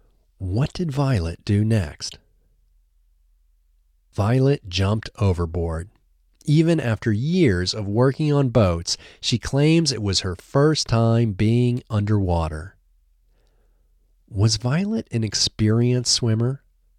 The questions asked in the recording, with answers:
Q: Was Violet an experienced swimmer?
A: No, Violet wasn't an experienced swimmer.